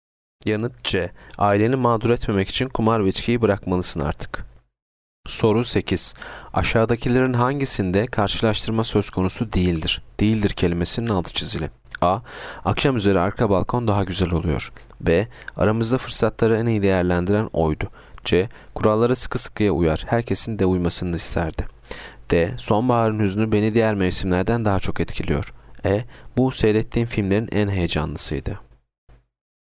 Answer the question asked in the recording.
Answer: Yanıt C. Kurallara sıkı sıkıya uyar, herkesin de uymasını da isterdi.